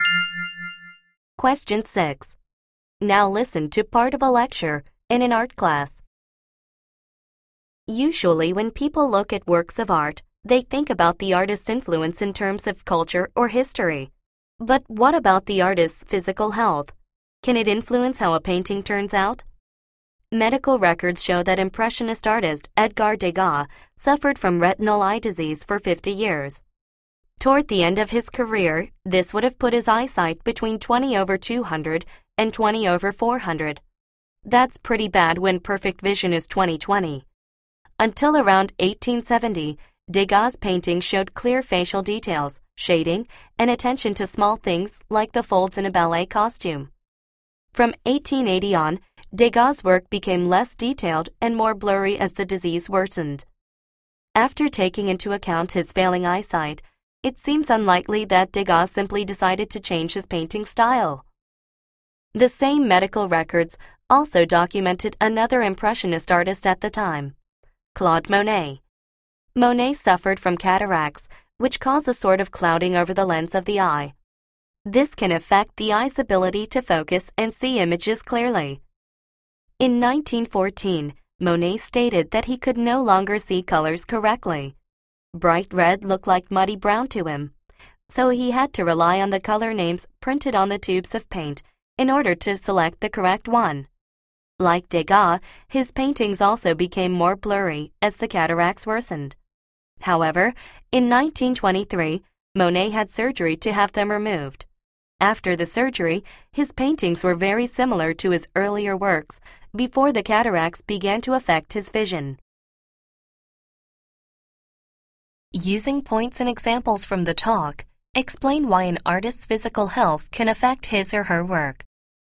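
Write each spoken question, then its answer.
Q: Using points and examples from the talk, explain why an artist's physical health can affect his or her work.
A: Eye disease changed what the artists could see, and so how they painted. Degas's retinal disease made his later work less detailed and more blurry. Monet's cataracts made his paintings blurry and his colours hard to see. After his cataracts were removed, his paintings looked like his earlier work again.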